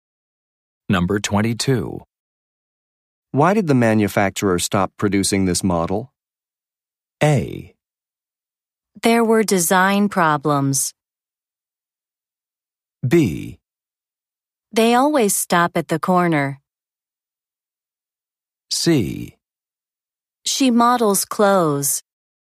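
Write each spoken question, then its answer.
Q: Why did the manufacturer stop producing this model?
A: A: There were design problems.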